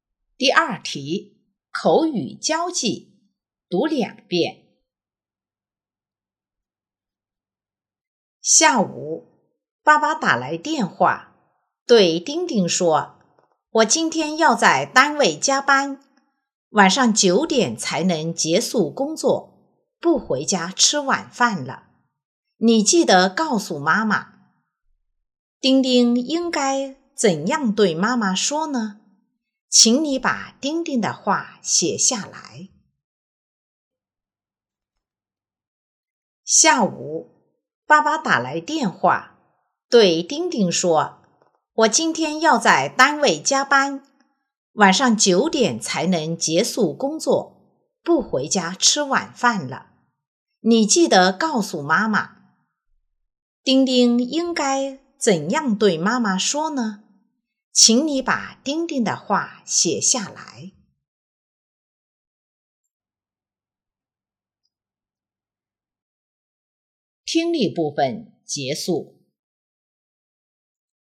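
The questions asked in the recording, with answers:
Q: 丁丁应该怎样对妈妈说呢?请你把丁丁的话写下来。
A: 妈妈,爸爸打电话说他今天要在单位加班,晚上9点才能结束工作,不回家吃晚饭了。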